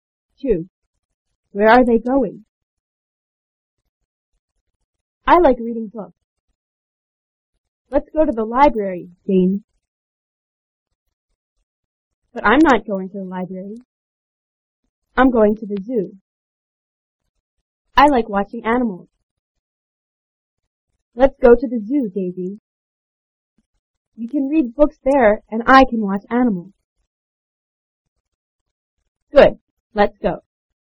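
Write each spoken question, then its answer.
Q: Where are they going?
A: To the zoo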